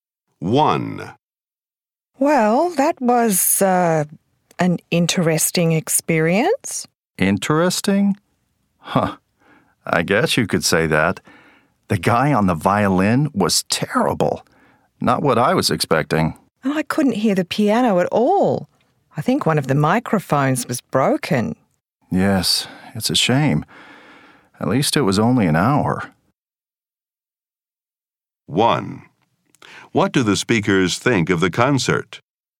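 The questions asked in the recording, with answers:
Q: What do the speakers think of the concert?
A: It was disappointing (bad violin, couldn't hear the piano)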